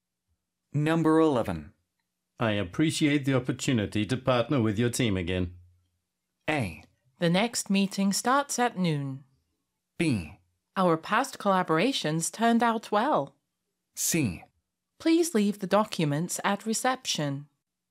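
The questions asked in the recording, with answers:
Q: I appreciate the opportunity to partner with your team again.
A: B: Our past collaborations turned out well.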